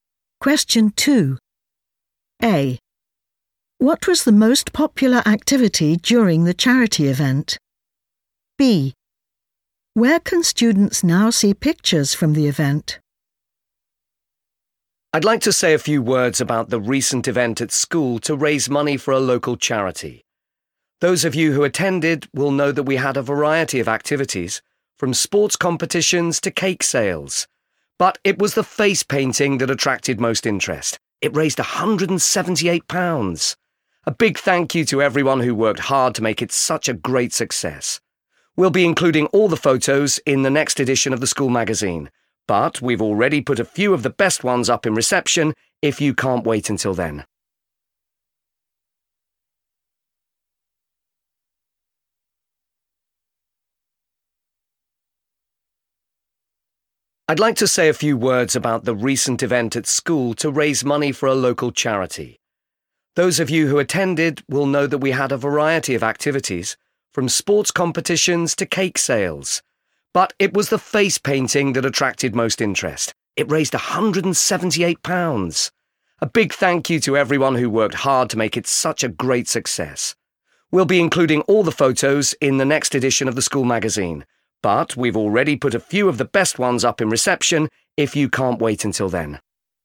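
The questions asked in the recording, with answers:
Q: What was the most popular activity during the charity event?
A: face painting

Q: Where can students now see pictures from the event?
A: in reception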